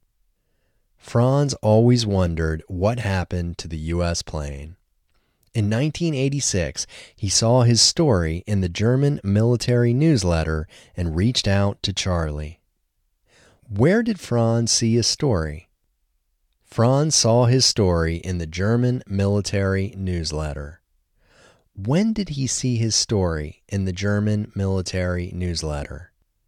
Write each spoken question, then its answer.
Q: When did he see his story in the German military newsletter?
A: He saw his story in the German military newsletter in 1986.